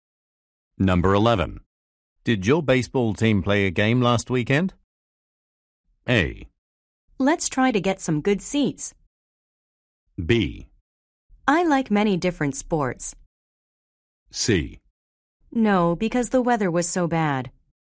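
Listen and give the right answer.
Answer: C: No, because the weather was so bad.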